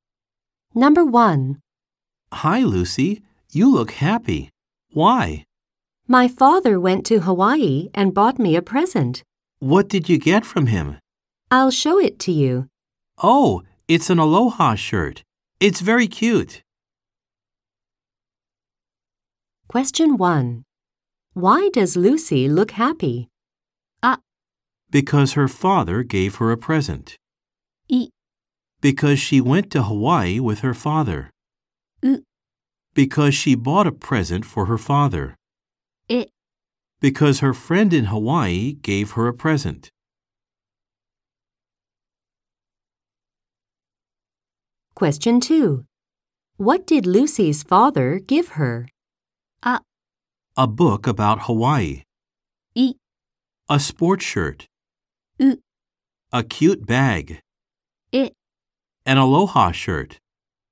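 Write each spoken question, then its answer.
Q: Why does Lucy look happy?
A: あ: Because her father gave her a present.

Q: What did Lucy's father give her?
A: え: An aloha shirt.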